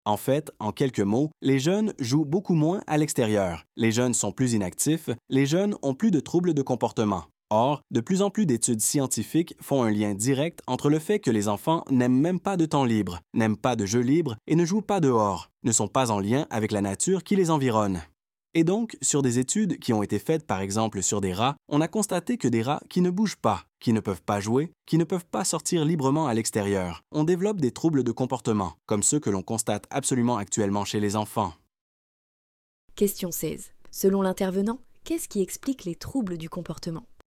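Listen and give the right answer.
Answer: Le manque de temps et de jeux libres à l'extérieur, sans contact avec la nature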